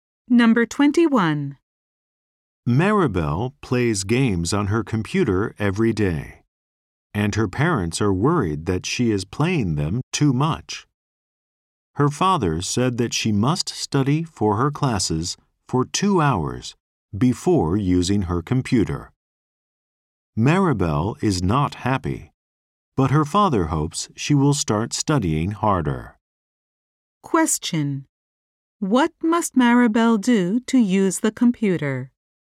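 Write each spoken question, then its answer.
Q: What must Maribel do to use the computer?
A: Study for her classes for 2 hours first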